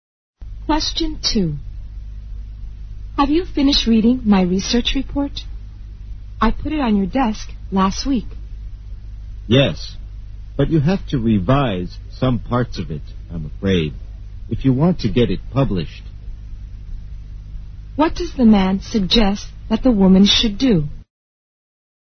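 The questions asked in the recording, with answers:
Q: What does the man suggest that the woman should do?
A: Revise some parts of her research report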